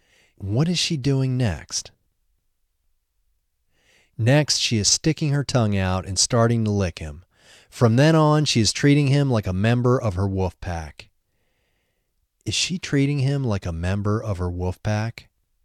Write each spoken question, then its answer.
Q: Is she treating him like a member of her wolf pack?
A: Yes, she is treating him like a member of her wolf pack.